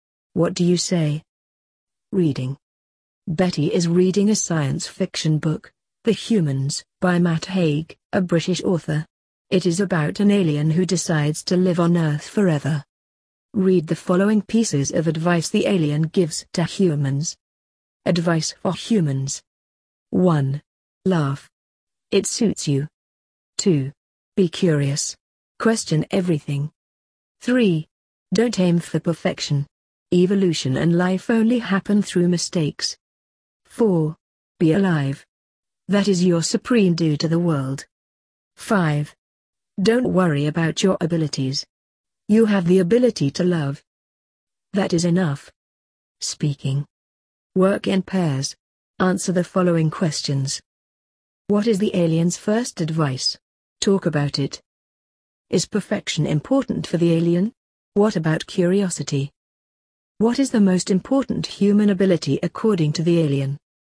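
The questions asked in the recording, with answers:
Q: What is the alien's first advice?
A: Laugh. It suits you.

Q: Is perfection important for the alien?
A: No, don't aim for perfection; life happens through mistakes.

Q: What is the most important human ability according to the alien?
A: The ability to love.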